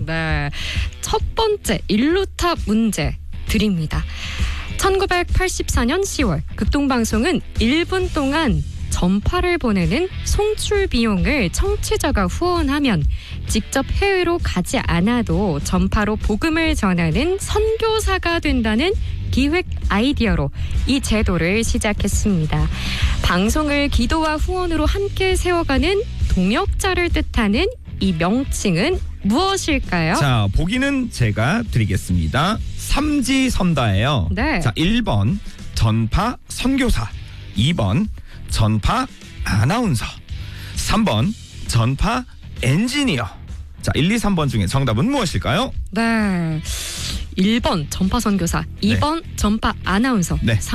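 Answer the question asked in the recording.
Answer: 1: 전파 선교사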